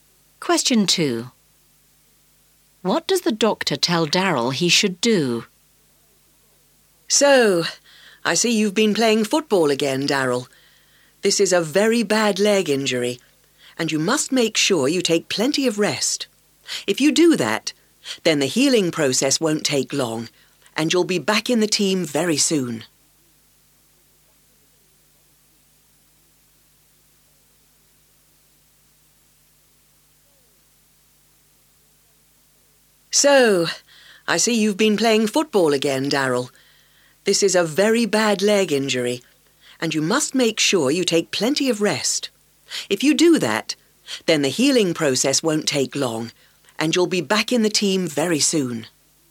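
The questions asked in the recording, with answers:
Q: What does the doctor tell Daryl he should do?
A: Take plenty of rest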